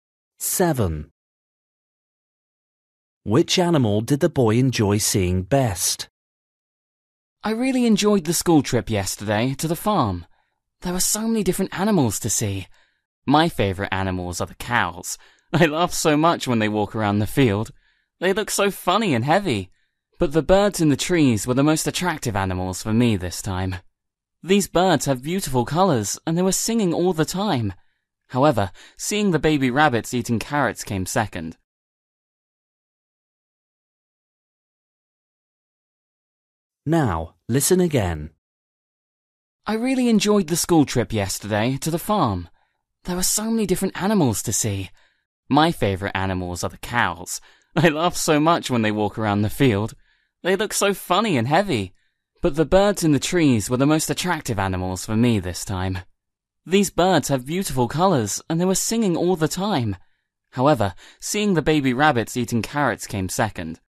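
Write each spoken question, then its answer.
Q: Which animal did the boy enjoy seeing best?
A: the birds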